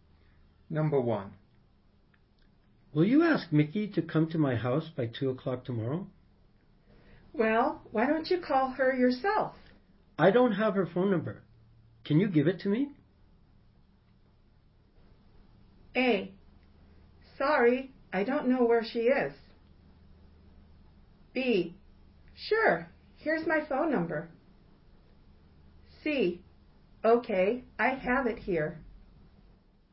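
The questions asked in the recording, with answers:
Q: Can you give it to me?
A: C: Okay, I have it here.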